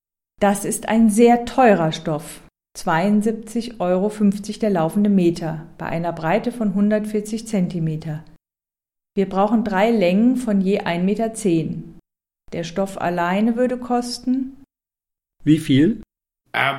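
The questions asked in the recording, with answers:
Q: Der Stoff alleine würde kosten...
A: 239,25 Euro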